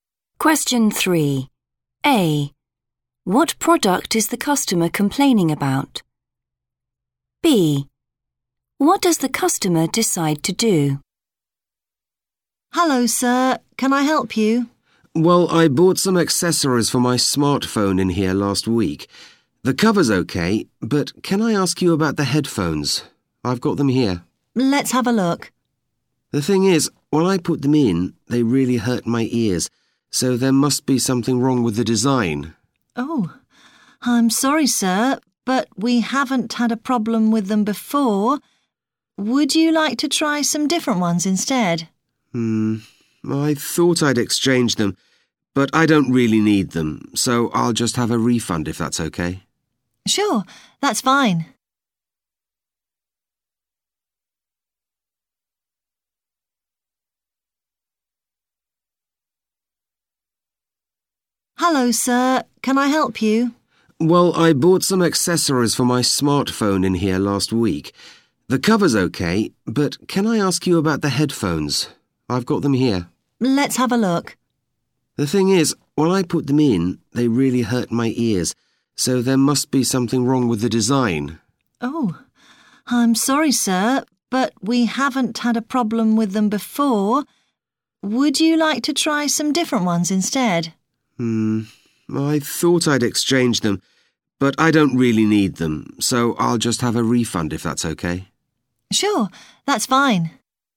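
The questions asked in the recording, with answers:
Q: What product is the customer complaining about?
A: Headphones

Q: What does the customer decide to do?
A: Get a refund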